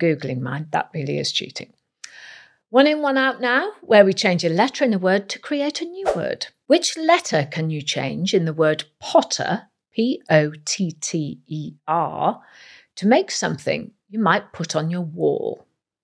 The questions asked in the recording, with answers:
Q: Which letter can you change in the word potter, P-O-T-T-E-R, to make something you might put on your wall?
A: We'll change the first letter T for a letter S to get the word poster, P-O-S-T-E-R.